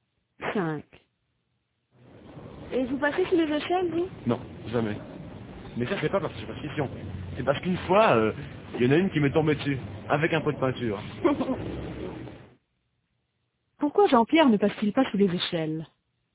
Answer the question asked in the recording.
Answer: Parce qu'une fois, il y en a une qui lui est tombée dessus, avec un pot de peinture.